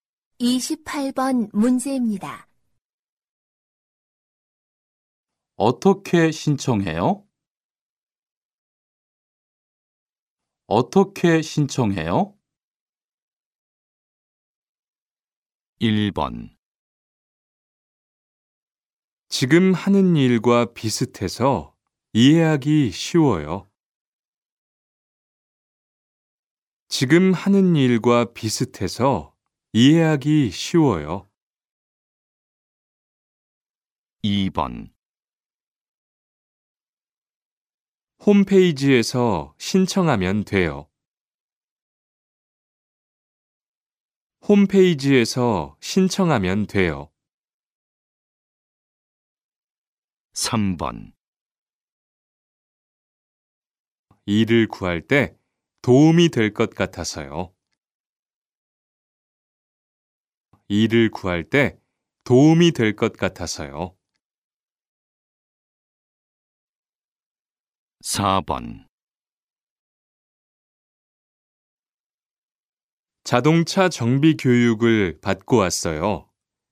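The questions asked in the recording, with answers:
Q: 어떻게 신청해요?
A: 2: 홈페이지에서 신청하면 돼요.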